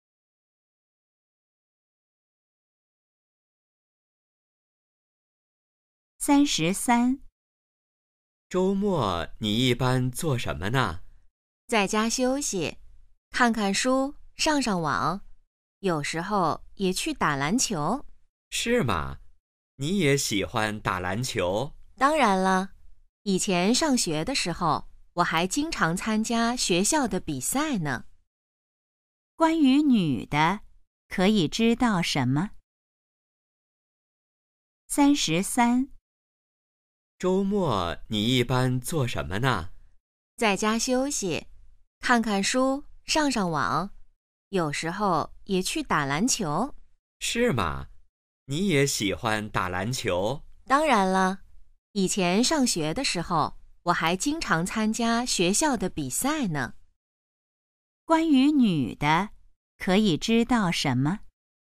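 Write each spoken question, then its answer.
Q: 关于女的,可以知道什么?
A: 她喜欢打篮球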